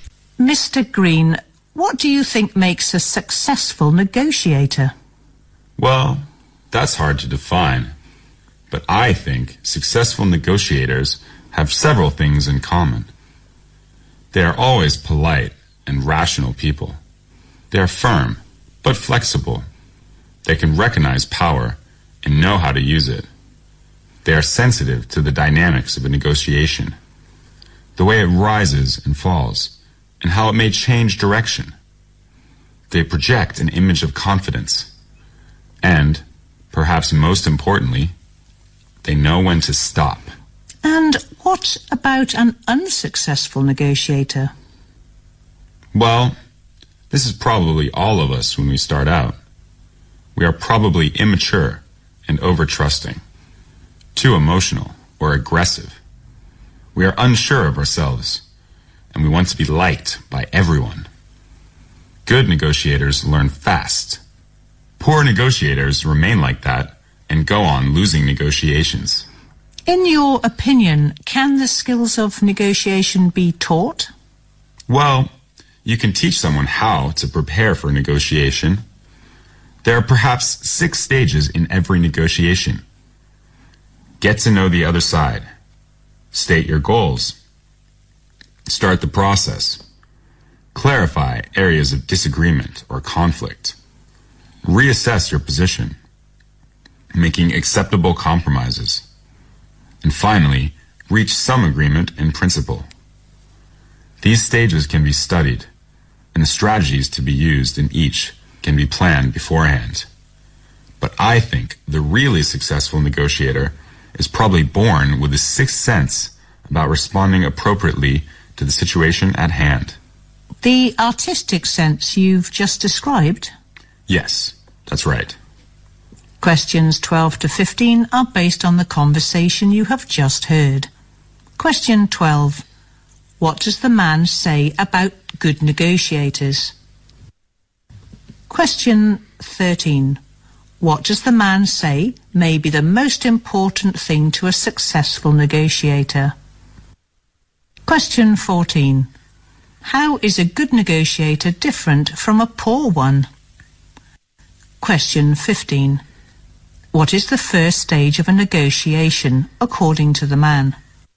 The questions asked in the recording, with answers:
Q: What does the man say about good negotiators?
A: They should be polite and rational.

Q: What does the man say may be the most important thing to a successful negotiator?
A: Successful negotiators should know when to stop.

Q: How is a good negotiator different from a poor one?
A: A good negotiator learns very quickly

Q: What is the first stage of a negotiation, according to the man?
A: Get to know the other side